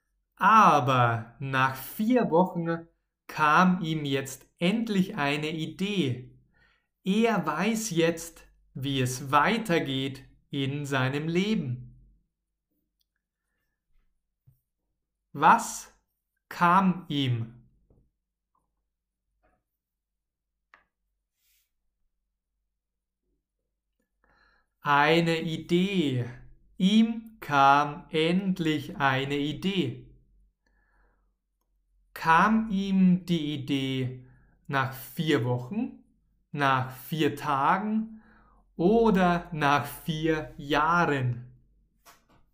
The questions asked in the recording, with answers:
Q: Kam ihm die Idee nach vier Wochen, nach vier Tagen oder nach vier Jahren?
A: Nach vier Wochen. Die Idee kam ihm nach vier Wochen.